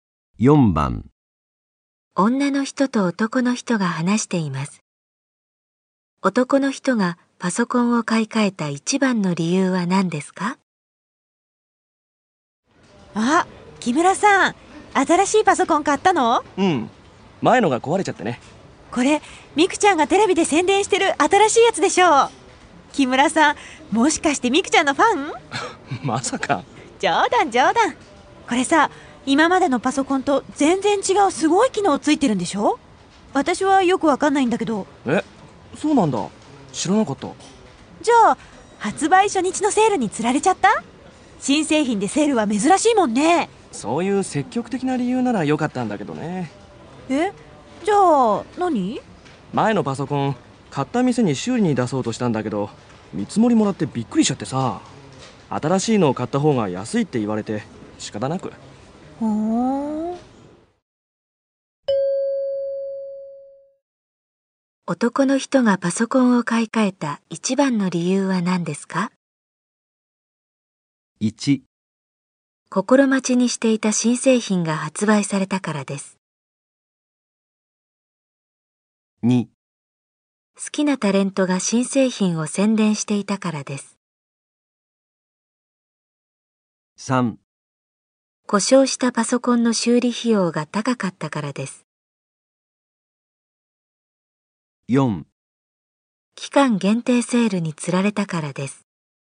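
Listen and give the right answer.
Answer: 3: 故障したパソコンの修理費用が高かったからです。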